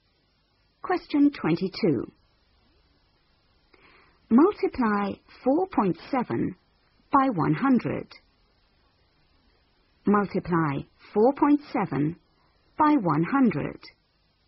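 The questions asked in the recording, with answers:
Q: Multiply 4.7 by 100.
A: 470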